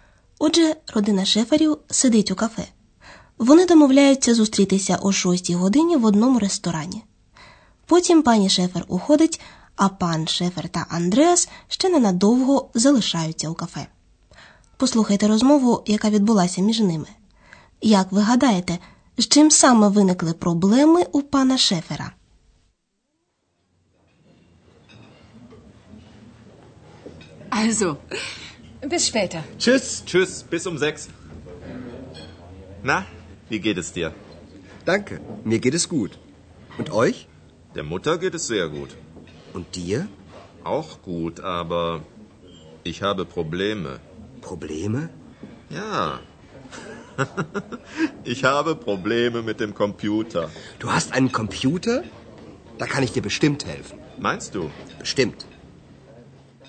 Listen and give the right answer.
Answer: Отже, пан Шефер має проблеми з комп'ютером.